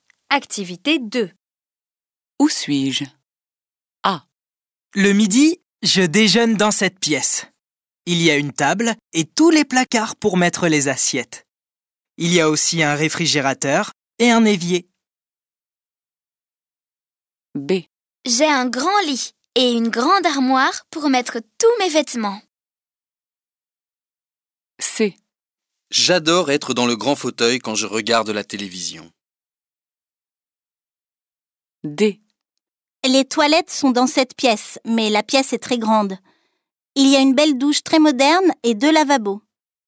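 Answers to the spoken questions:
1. dans la cuisine
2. dans la chambre
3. dans le salon
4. dans la salle de bains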